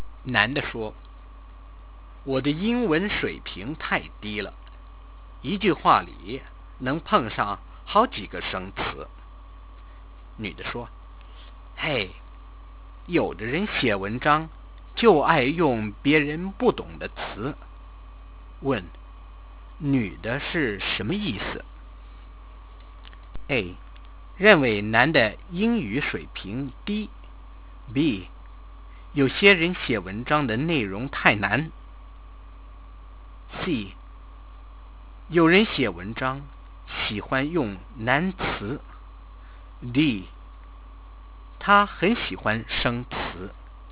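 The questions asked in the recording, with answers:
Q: 女的是什么意思?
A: C: 有人写文章喜欢用难词。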